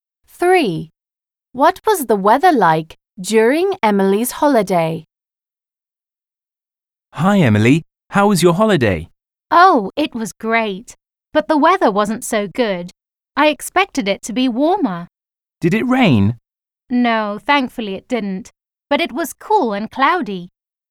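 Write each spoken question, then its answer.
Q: What was the weather like during Emily's holiday?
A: Cool and cloudy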